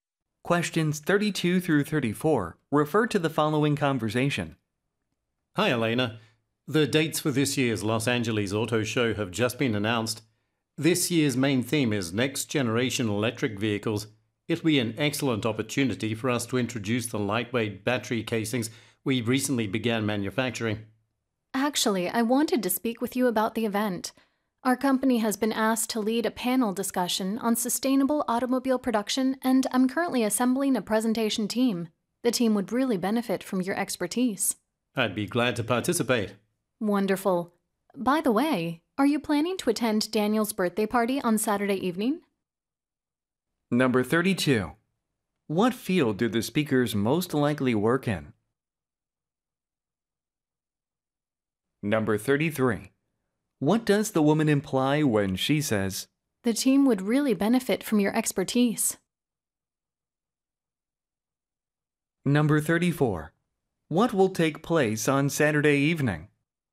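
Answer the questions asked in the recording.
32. B번 Automotive Manufacturing. 그래서 이제 B가 32번에 정답이에요.
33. She wants the listener to join the presentation team
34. Daniel's birthday party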